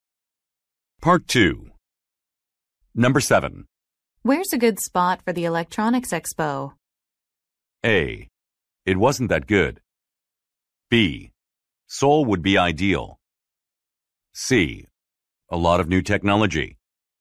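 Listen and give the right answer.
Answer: B: Seoul would be ideal.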